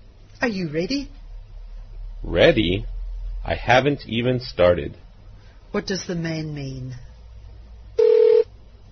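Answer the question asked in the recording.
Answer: He is not ready; he hasn't even started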